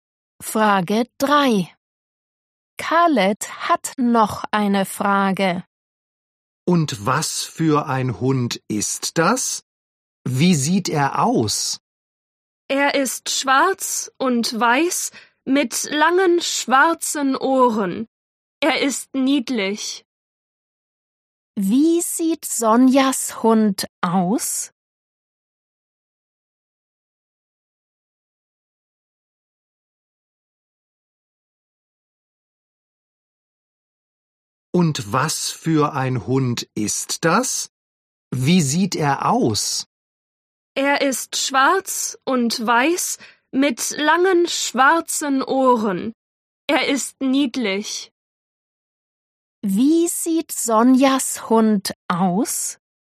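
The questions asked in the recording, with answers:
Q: Wie sieht Sonjas Hund aus?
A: schwarz und weiß mit langen schwarzen Ohren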